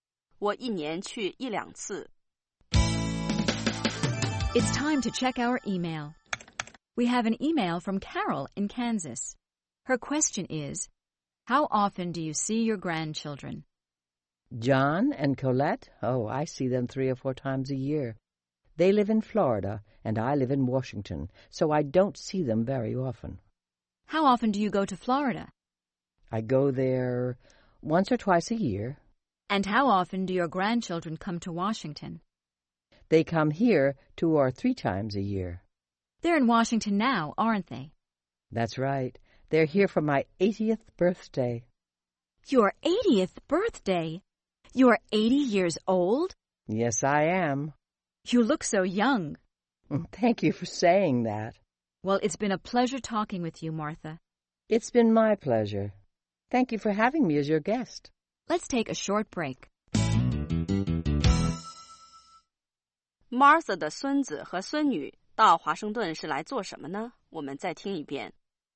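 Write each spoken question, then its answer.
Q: Martha 的孙子和孙女到华盛顿是来做什么呢?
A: 来给她过八十岁生日。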